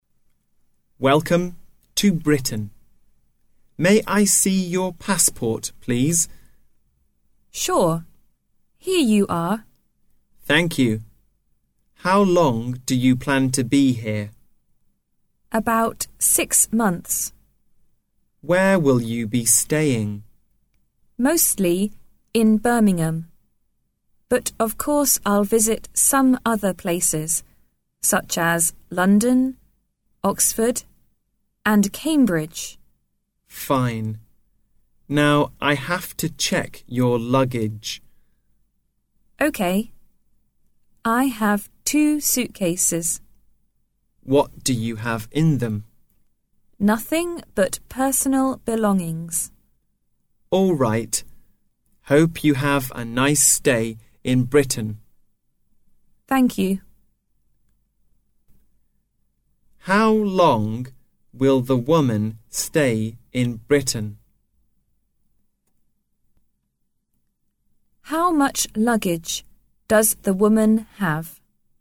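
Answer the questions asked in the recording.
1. About 6 months
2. 2 suitcases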